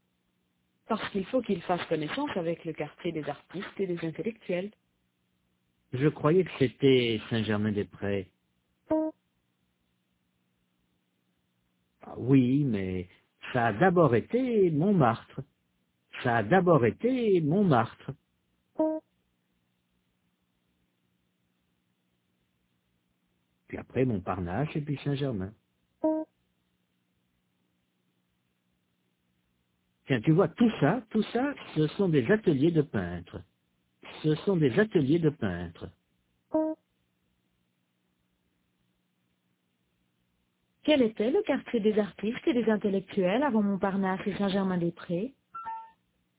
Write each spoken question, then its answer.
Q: Quel était le quartier des artistes et des intellectuels avant Montparnasse et Saint-Germain-des-Prés?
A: Montmartre.